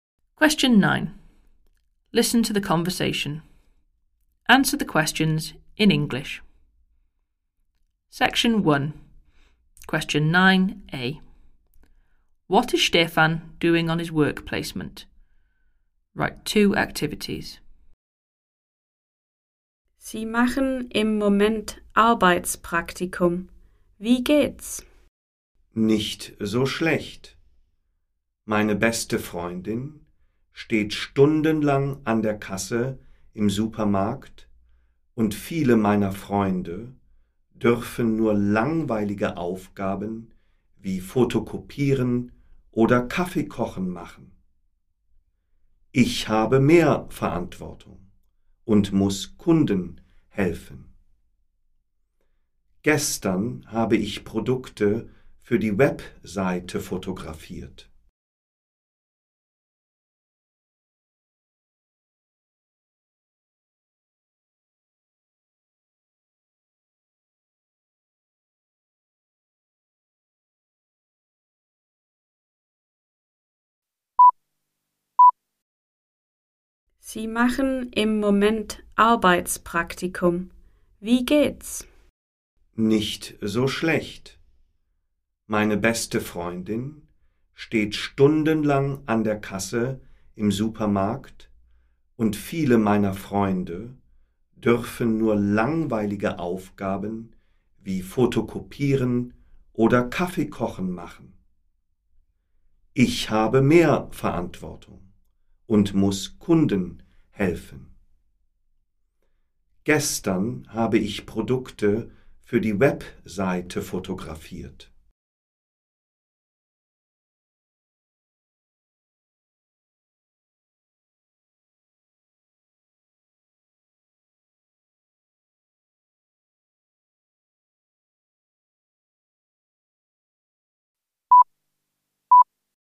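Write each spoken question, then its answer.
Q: What is Stefan doing on his work placement?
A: Helping customers and photographing products for the website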